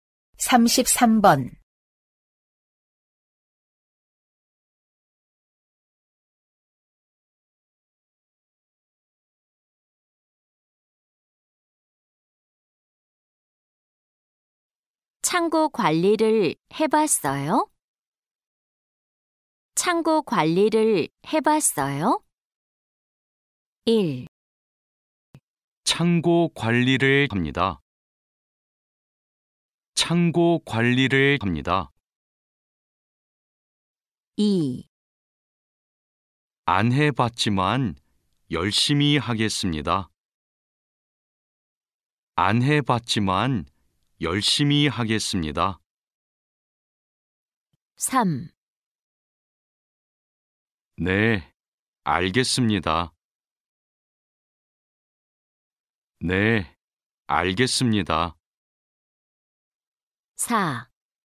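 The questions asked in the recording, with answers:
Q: 창고 관리를 해봤어요?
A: 2: 안 해봤지만 열심히 하겠습니다.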